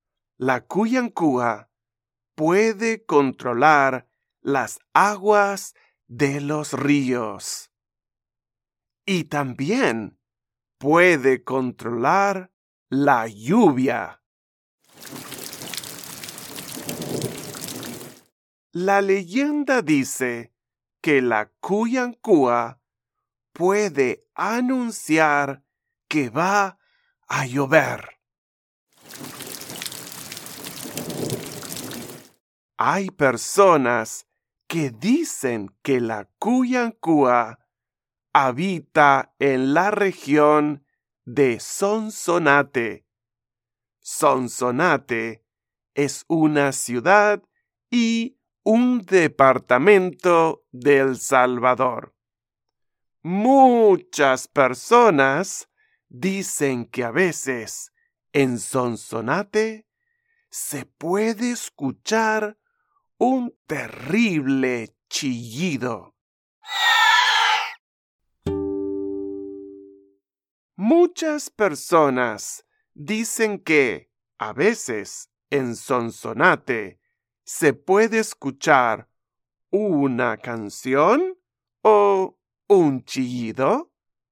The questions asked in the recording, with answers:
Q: Muchas personas dicen que, a veces, en Sonsonate, se puede escuchar una canción o un chillido.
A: Sí, un chillido.